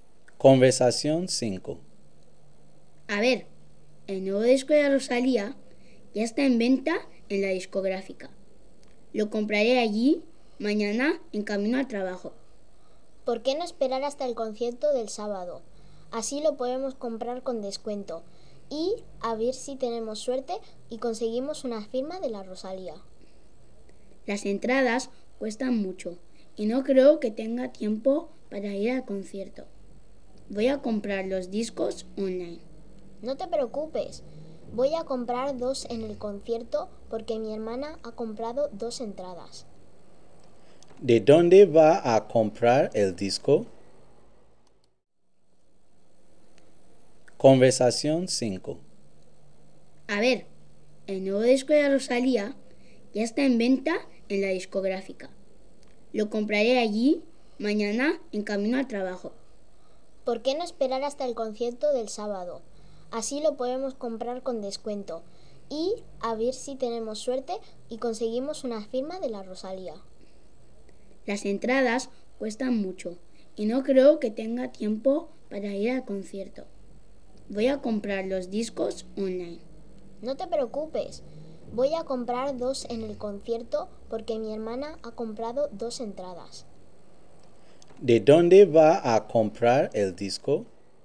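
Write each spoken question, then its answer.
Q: ¿De dónde va a comprar el disco?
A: En el concierto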